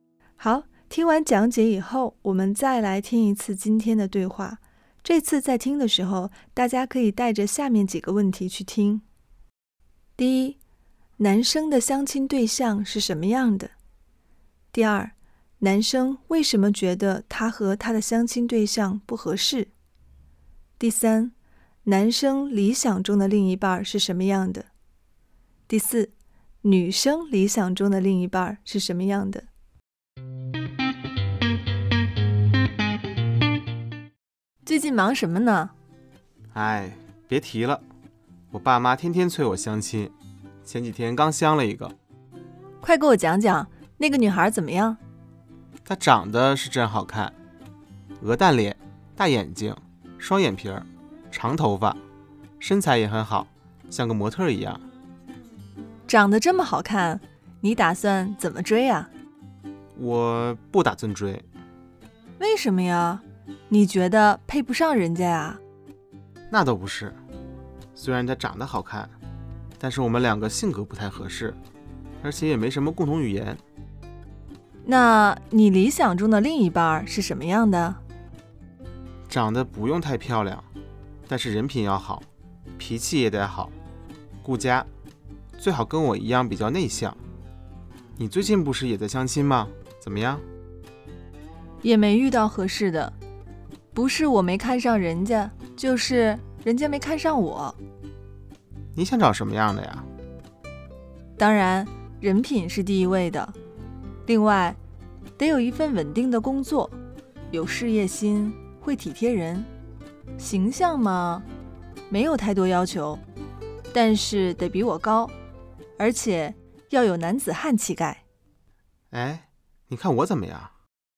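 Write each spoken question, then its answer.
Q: 男生的相亲对象是什么样的?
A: 长得很好看:鹅蛋脸,大眼睛,双眼皮,长头发,身材很好,像模特一样

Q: 男生为什么觉得他和他的相亲对象不合适?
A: 两个人性格不太合适,也没什么共同语言

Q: 男生理想中的另一半是什么样的?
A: 不用太漂亮,但人品要好,脾气好,顾家,最好比较内向

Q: 女生理想中的另一半是什么样的?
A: 人品好,有稳定的工作,有事业心,会体贴人,比她高,有男子汉气概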